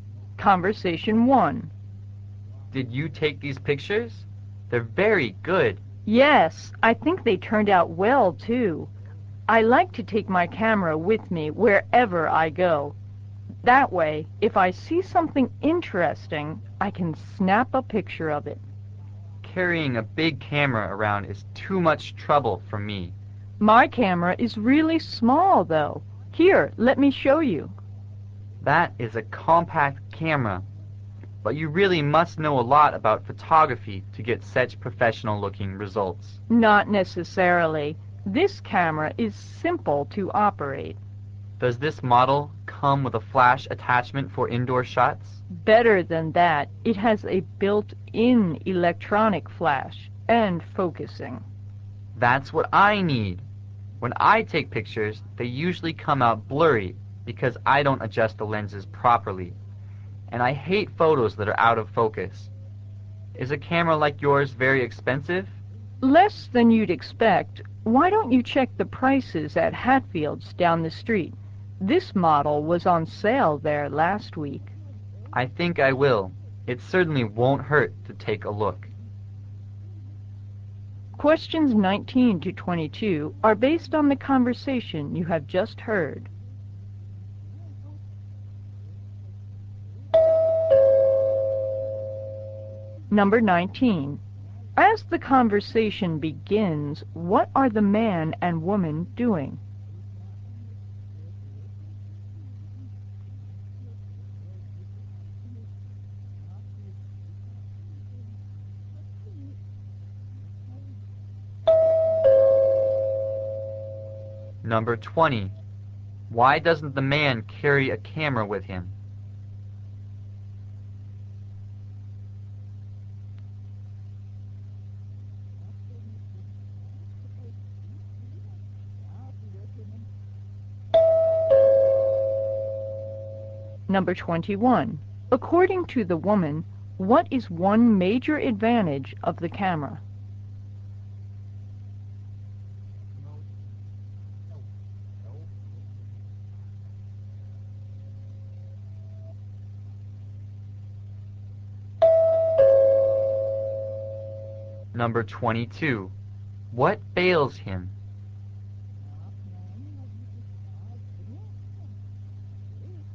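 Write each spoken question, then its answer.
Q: As the conversation begins, what are the man and woman doing?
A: Looking at pictures

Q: Why doesn't the man carry a camera with him?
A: Carrying a big camera is too much trouble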